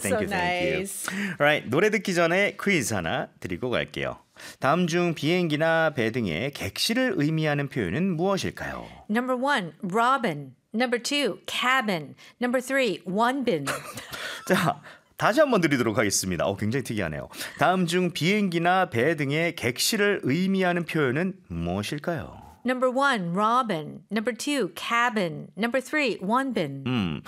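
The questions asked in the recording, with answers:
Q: 다음 중 비행기나 배 등의 객실을 의미하는 표현은 무엇일까요?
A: 2: cabin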